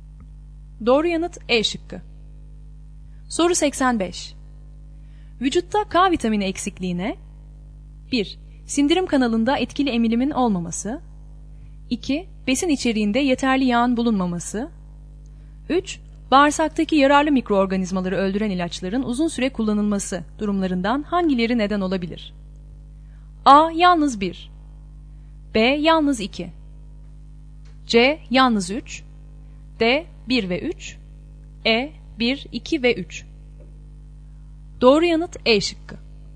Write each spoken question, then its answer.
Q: Bağırsaktaki yararlı mikroorganizmaları öldüren ilaçların uzun süre kullanılması durumlarından hangileri neden olabilir?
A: Doğru yanıt E şıkkı.